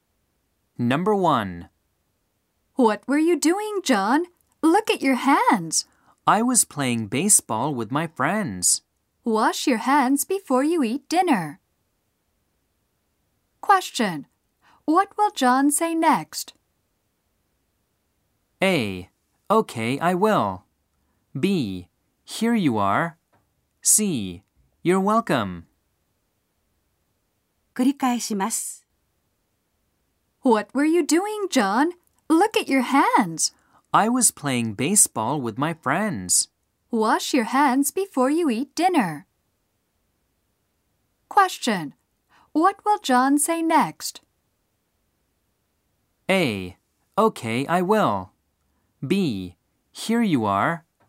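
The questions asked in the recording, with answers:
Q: What will John say next?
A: A: Okay, I will.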